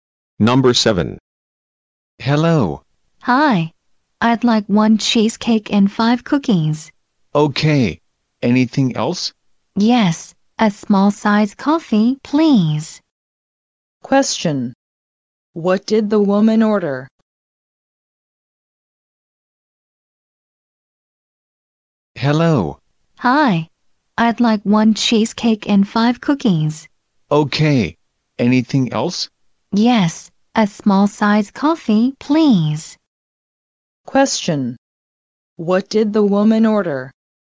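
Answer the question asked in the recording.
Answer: One cheesecake, 5 cookies and a small coffee.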